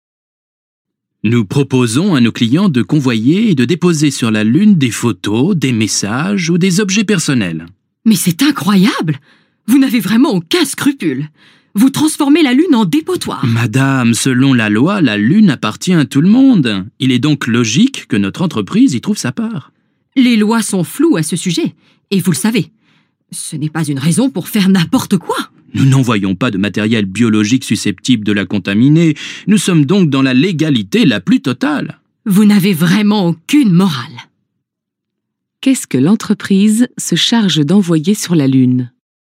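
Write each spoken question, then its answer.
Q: Qu'est-ce que l'entreprise se charge d'envoyer sur la Lune ?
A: Des photos, des messages ou des objets personnels de ses clients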